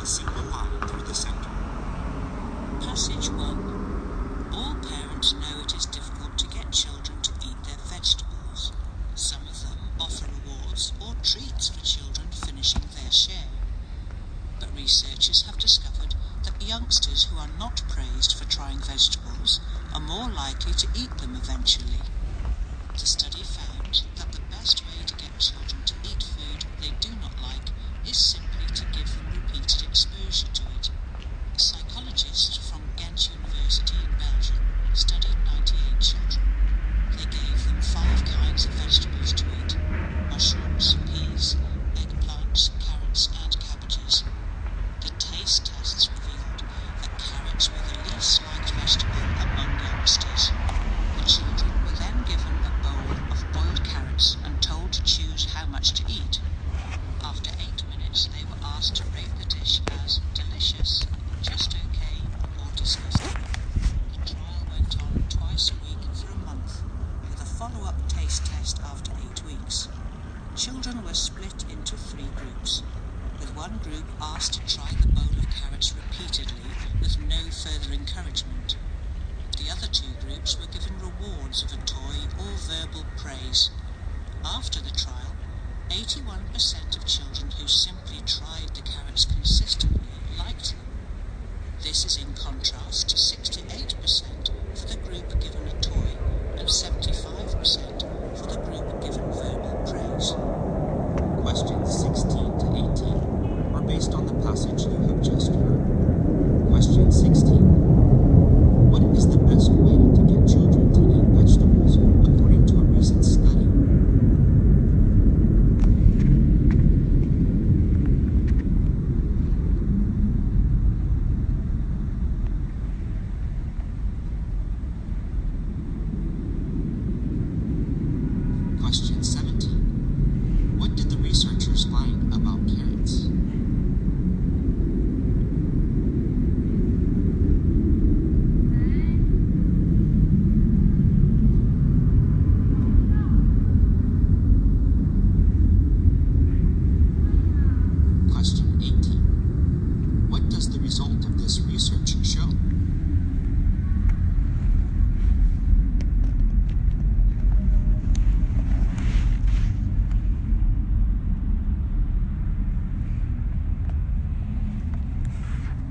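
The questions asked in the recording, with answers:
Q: What is the best way to get children to eat vegetables according to a recent study?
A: Give them repeated exposure to the vegetables.

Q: What did the researchers find about carrots?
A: Carrots were the vegetable children liked least.

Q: What does the result of this research show?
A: Children who weren't rewarded were more likely to come to like the vegetable.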